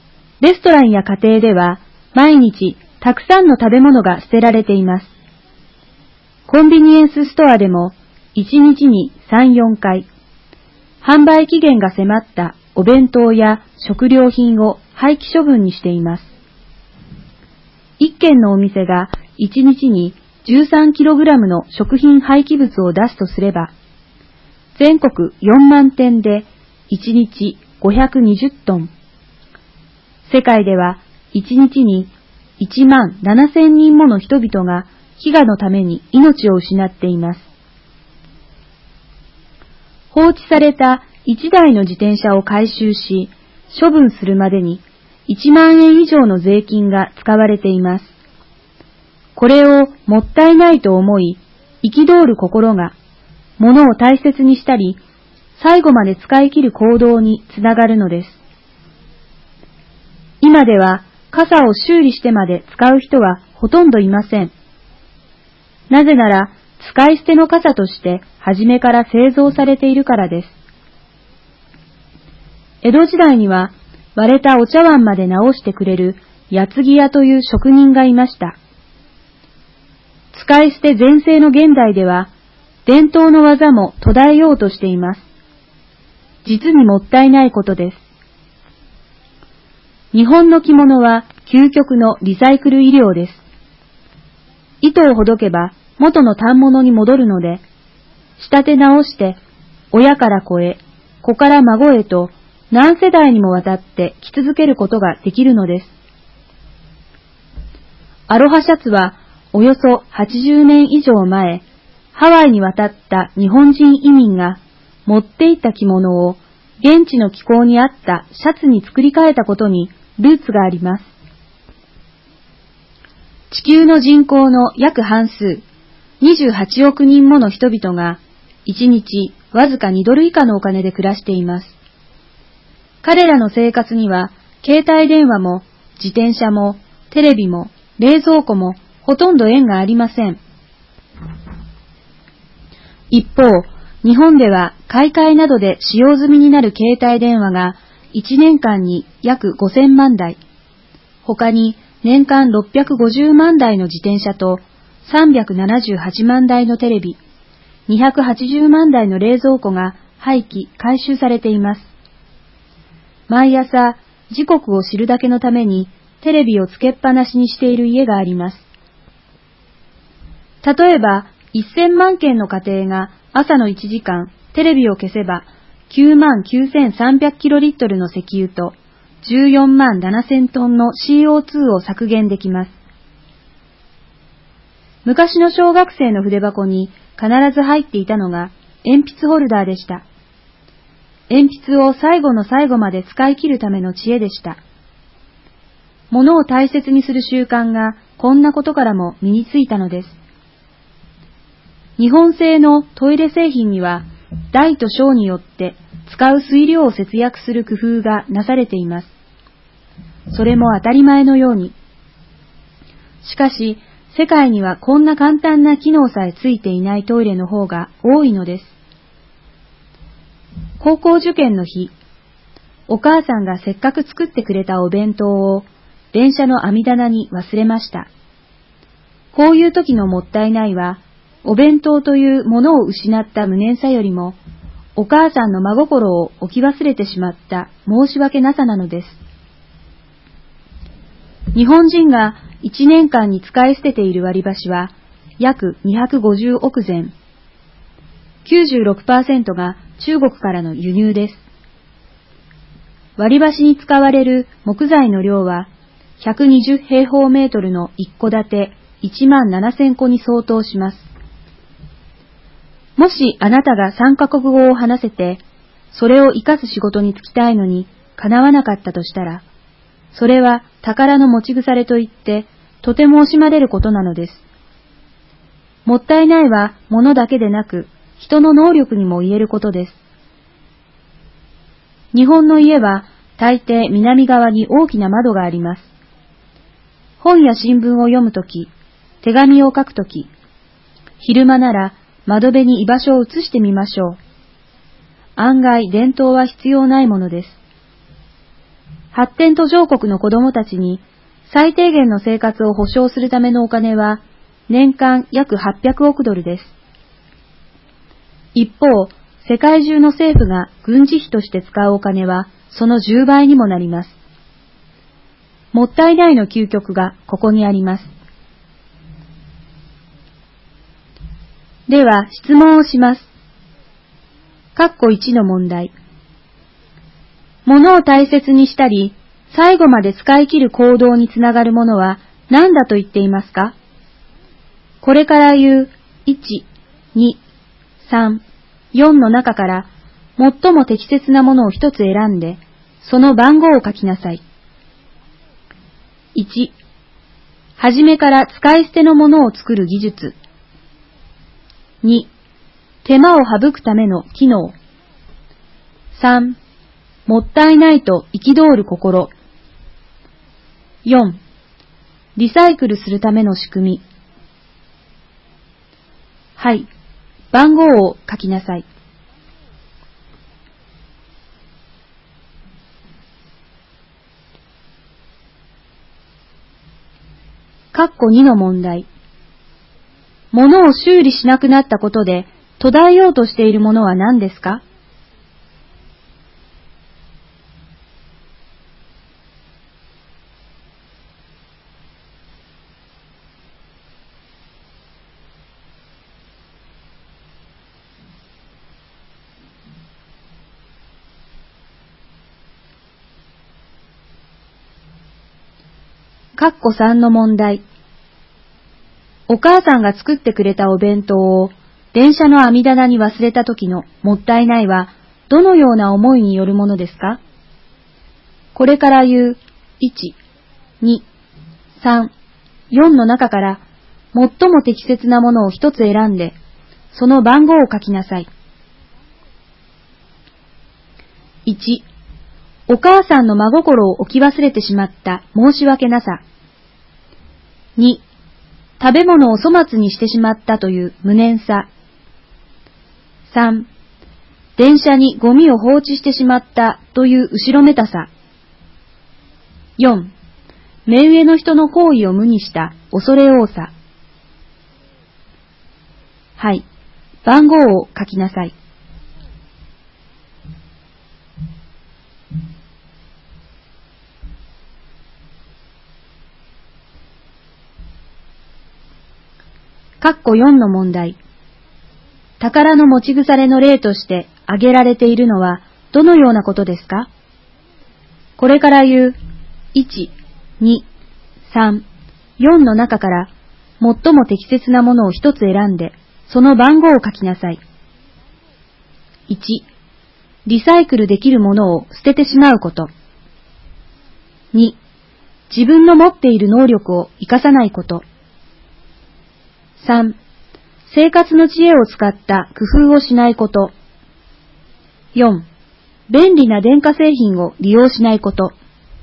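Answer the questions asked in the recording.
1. 3: もったいないと憤る心
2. 伝統の技
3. 1: お母さんの真心を置き忘れてしまった申し訳なさ
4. 2: 自分の持っている能力を生かさないこと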